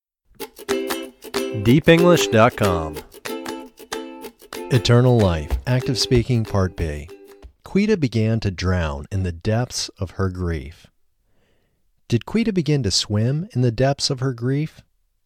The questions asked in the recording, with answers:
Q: Did Quita begin to swim in the depths of her grief?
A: No, Quita didn't begin to swim in the depths of her grief.